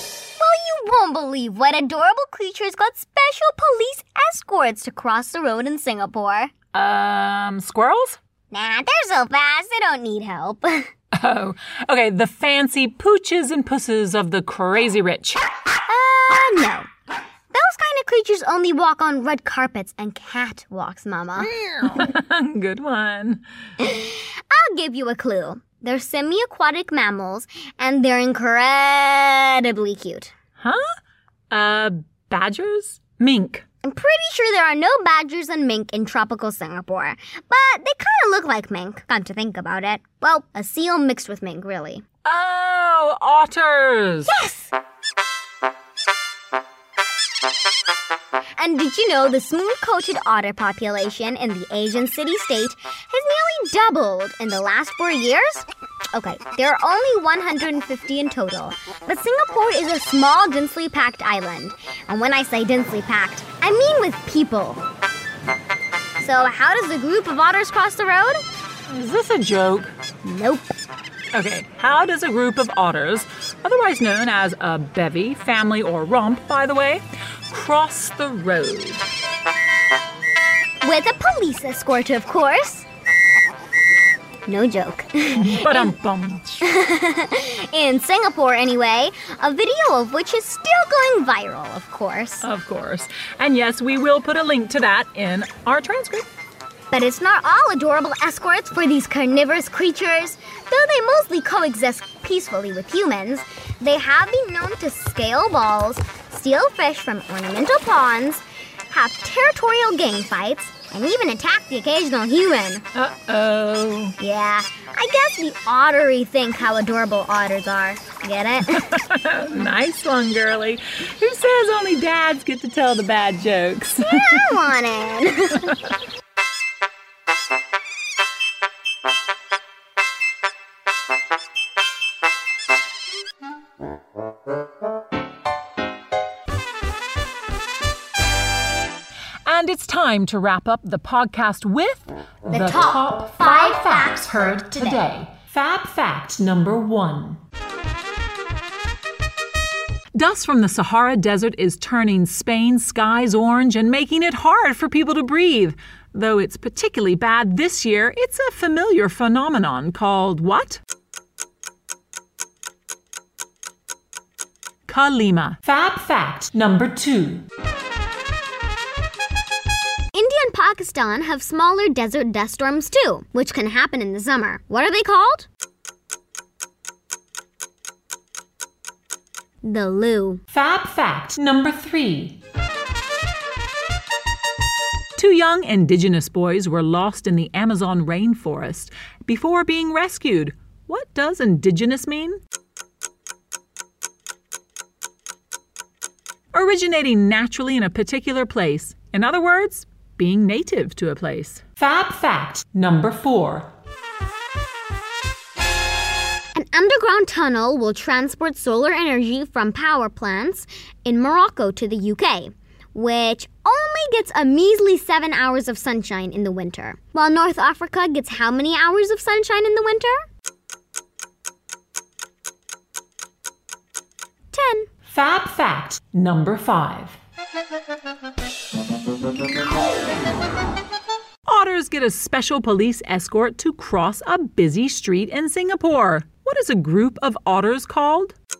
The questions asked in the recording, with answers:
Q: What is a group of otters called?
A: A bevy, family, or romp?